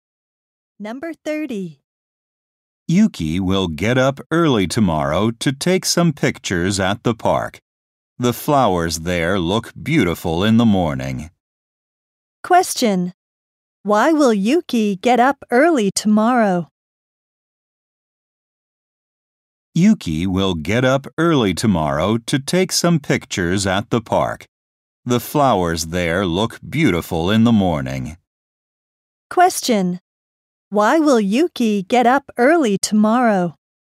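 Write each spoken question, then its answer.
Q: Why will Yuki get up early tomorrow?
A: To take pictures at the park.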